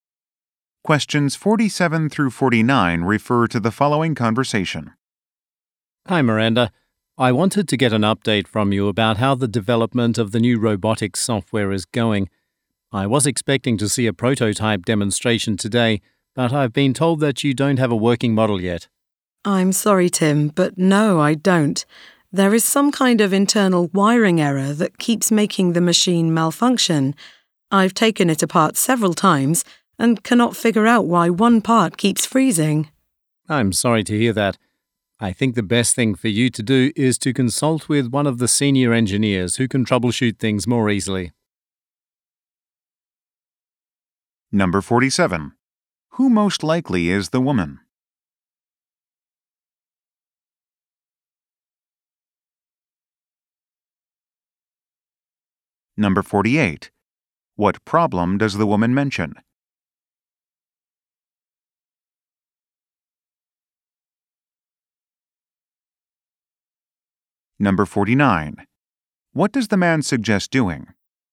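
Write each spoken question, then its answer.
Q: What problem does the woman mention?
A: A wiring error makes the machine malfunction

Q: What does the man suggest doing?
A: Consulting a senior engineer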